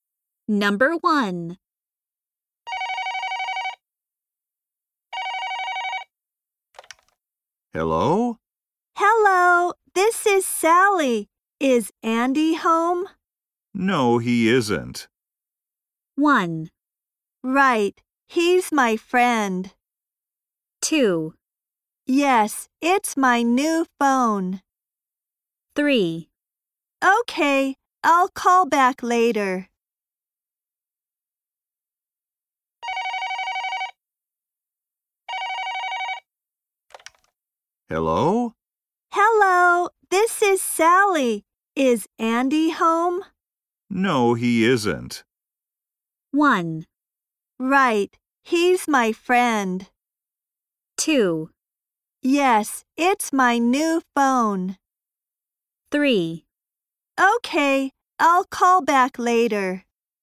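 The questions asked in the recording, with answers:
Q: No, he isn't.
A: 3: Okay, I'll call back later.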